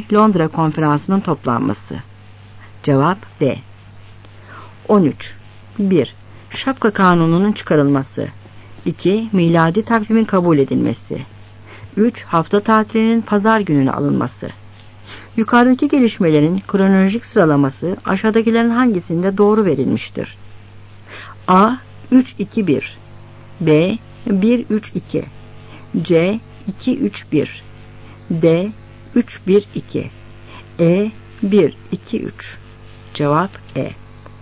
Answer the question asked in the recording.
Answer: Cevap E.